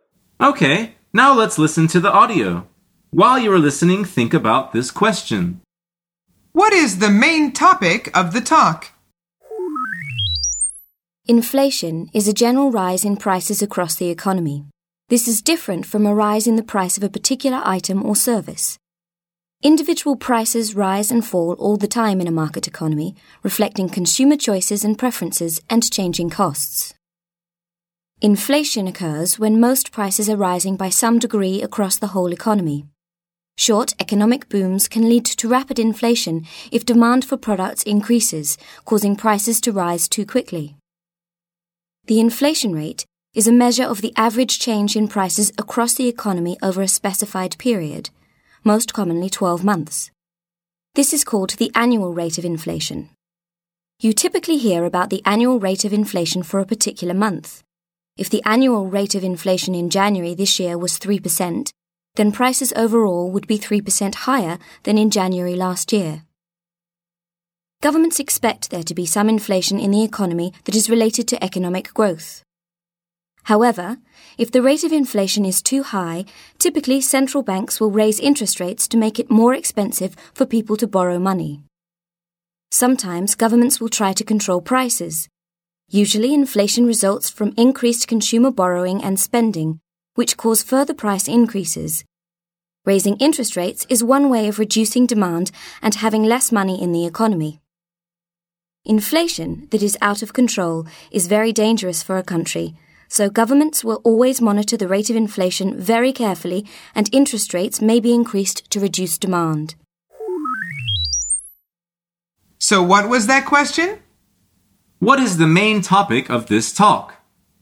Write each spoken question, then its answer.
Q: What is the main topic of this talk?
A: The answer is inflation and how it can be controlled.